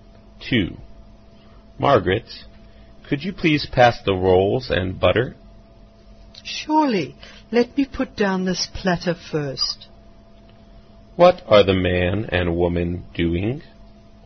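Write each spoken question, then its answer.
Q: What are the man and woman doing?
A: Eating a meal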